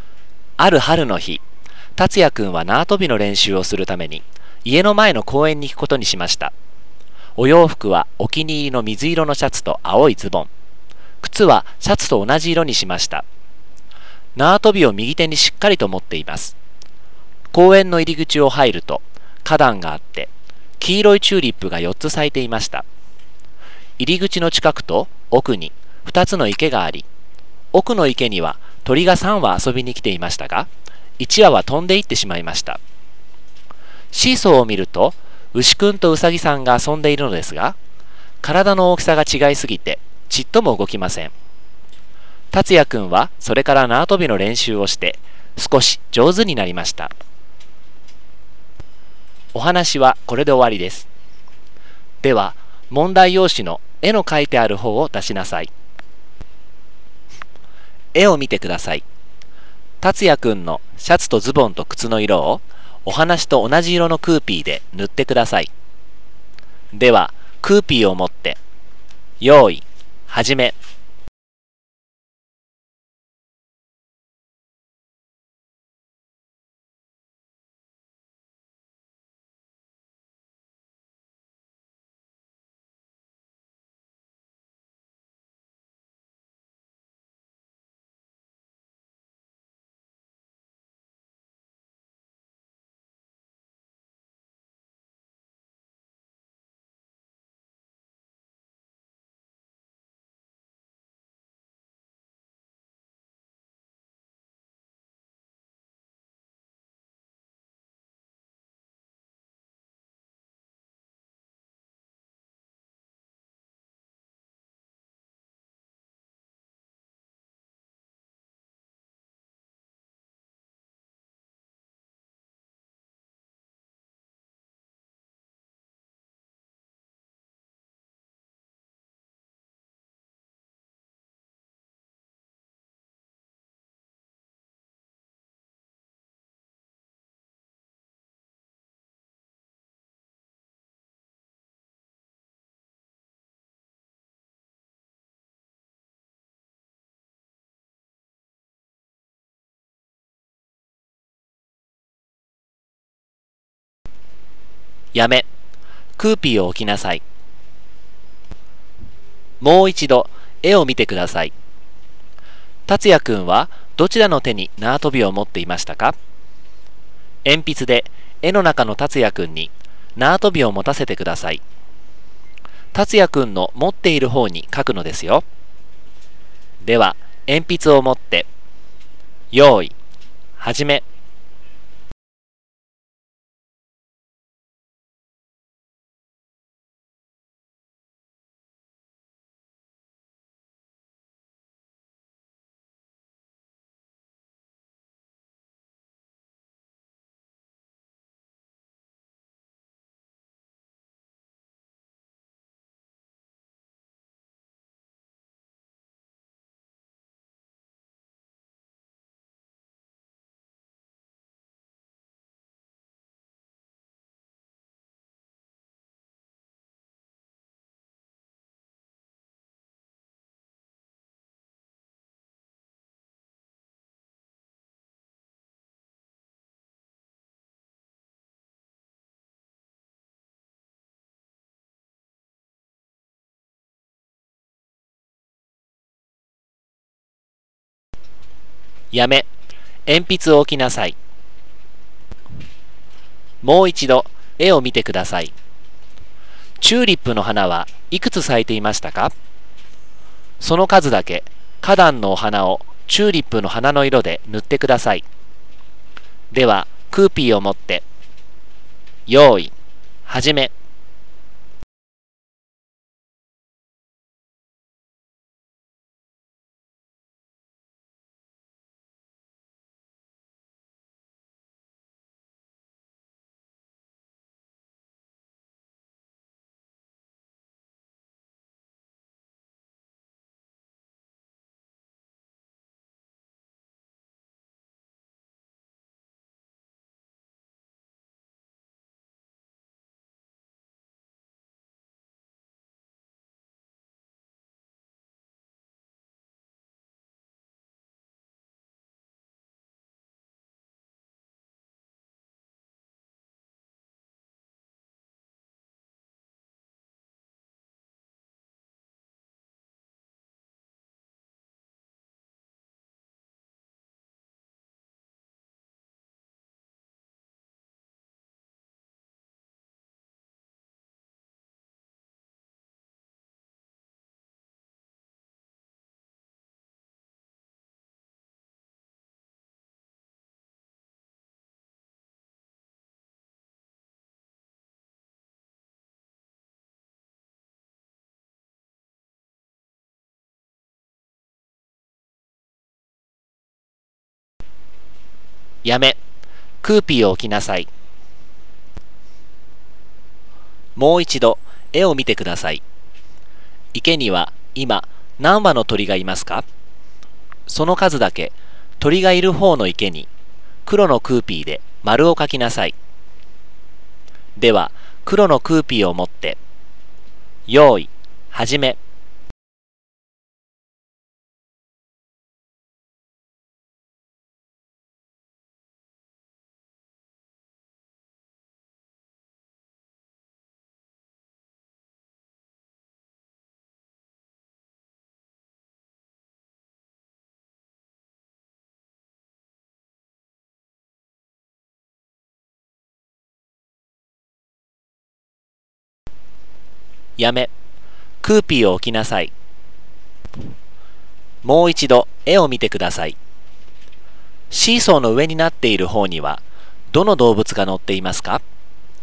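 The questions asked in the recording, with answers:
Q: 達也くんはどちらの手に縄跳びを持っていましたか?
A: 右手

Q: チューリップの花はいくつ咲いていましたか?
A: 4つ

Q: 池には今何羽の鳥がいますか?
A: 2羽(奥の池)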